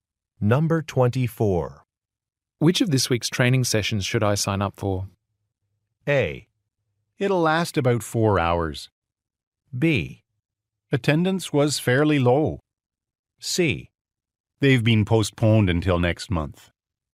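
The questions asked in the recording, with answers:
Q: Which of this week's training sessions should I sign up for?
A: C: They've been postponed until next month.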